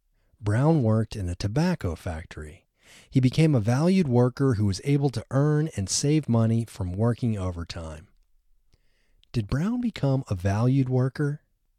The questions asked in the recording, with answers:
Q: Did Brown become a valued worker?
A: Yes, Brown became a valued worker.